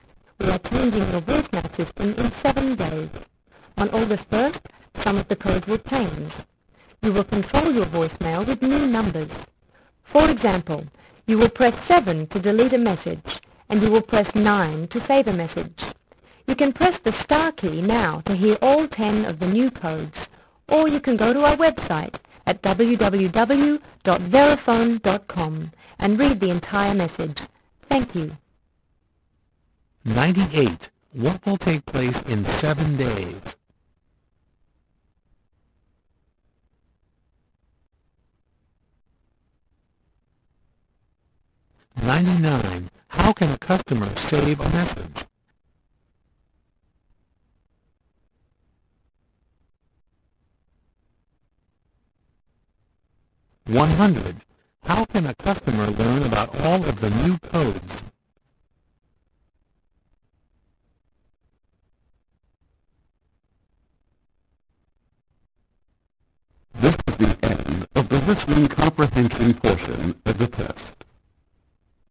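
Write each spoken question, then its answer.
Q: What will take place in 7 days?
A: Some of the voicemail codes will change

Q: How can a customer save a message?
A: Press 9

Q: How can a customer learn about all of the new codes?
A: Press the star key or go to the website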